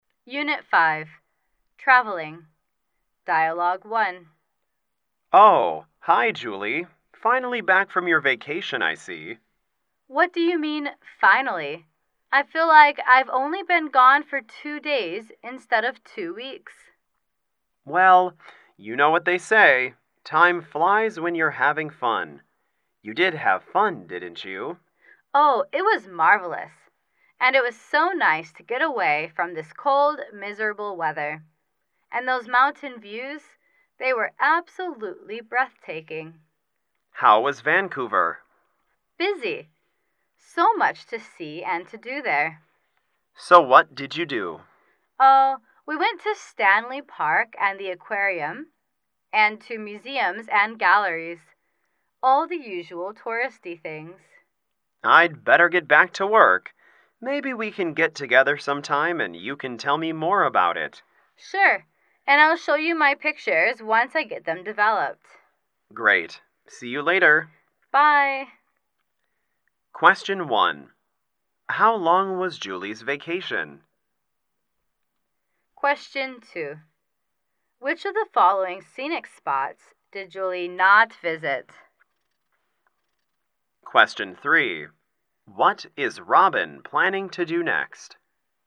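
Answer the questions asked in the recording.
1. Two weeks
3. Get back to work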